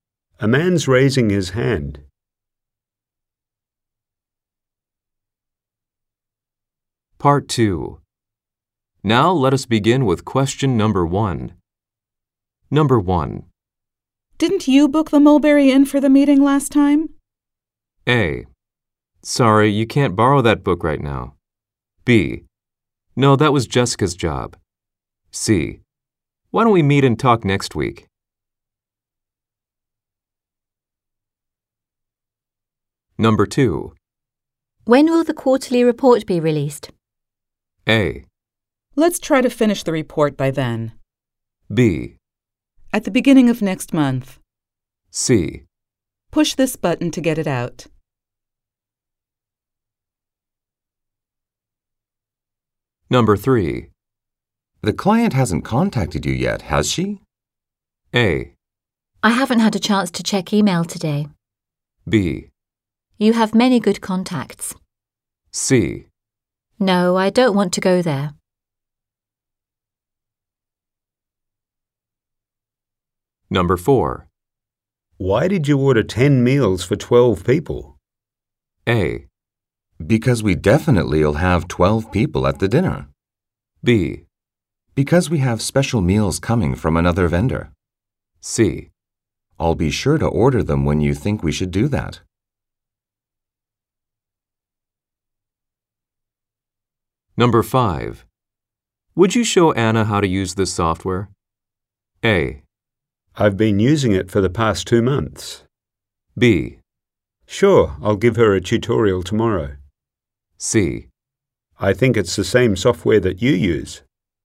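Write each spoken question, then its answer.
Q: Didn't you book the Mulberry Inn for the meeting last time?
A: B: No, that was Jessica's job.

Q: When will the quarterly report be released?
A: B: At the beginning of next month.

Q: The client hasn't contacted you yet, has she?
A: A: I haven't had a chance to check email today.

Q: Why did you order 10 meals for 12 people?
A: B: Because we have special meals coming from another vendor.

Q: Would you show Anna how to use this software?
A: B: Sure, I'll give her a tutorial tomorrow.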